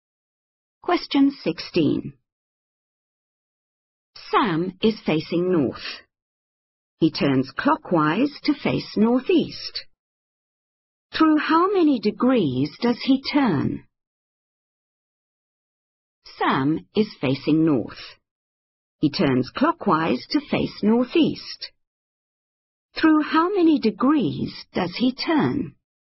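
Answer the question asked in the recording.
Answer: 45 degrees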